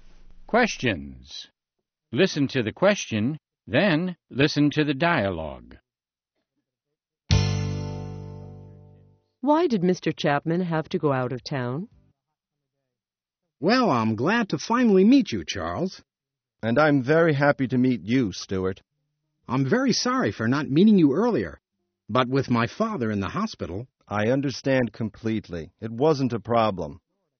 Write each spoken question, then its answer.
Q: Why did Mr. Chapman have to go out of town?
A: His father was in the hospital.